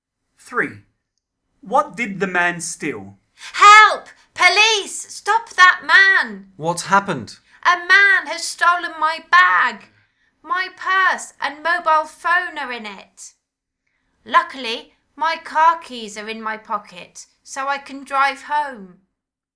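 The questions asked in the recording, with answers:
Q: What did the man steal?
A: a bag (with purse and mobile phone)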